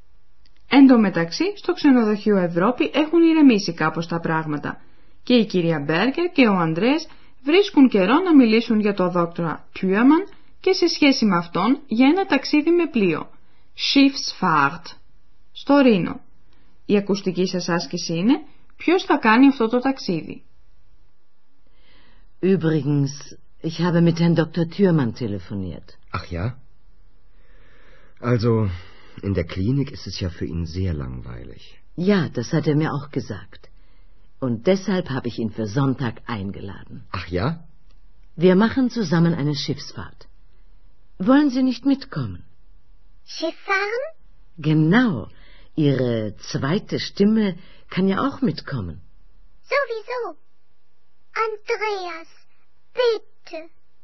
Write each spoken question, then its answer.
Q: Η ακουστική σας άσκηση είναι ποιος θα κάνει αυτό το ταξίδι.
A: Η κυρία Μπέργκερ προσκάλεσε τον δόκτορα Τιούαμαν να κάνουν ένα ταξίδι με πλοίο.